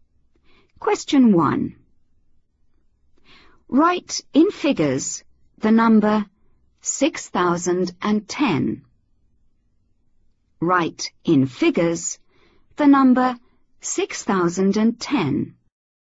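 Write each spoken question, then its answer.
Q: Write in figures the number 6010.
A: 6010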